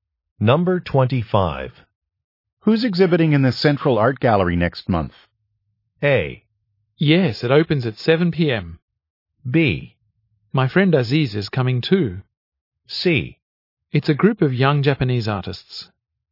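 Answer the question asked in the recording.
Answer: C: It's a group of young Japanese artists.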